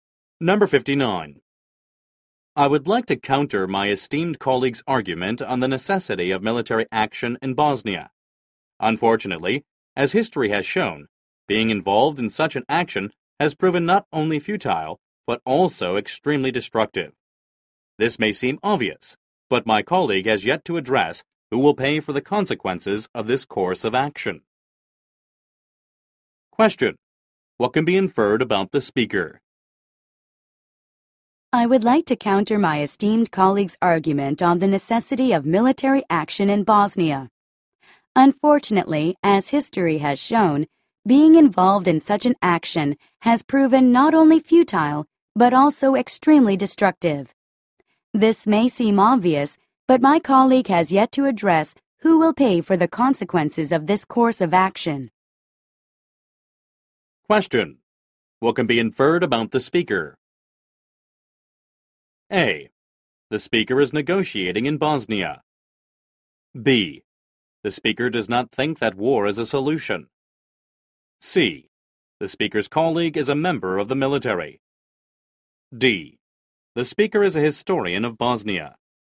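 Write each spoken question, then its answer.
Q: What can be inferred about the speaker?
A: B: The speaker does not think that war is a solution.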